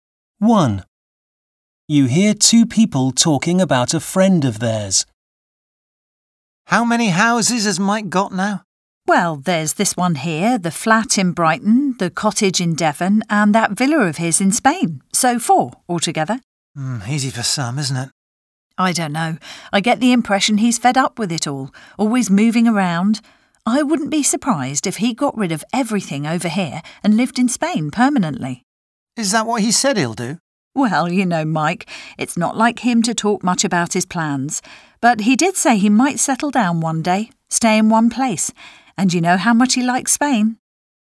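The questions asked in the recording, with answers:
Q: How many houses has Mike got now?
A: Four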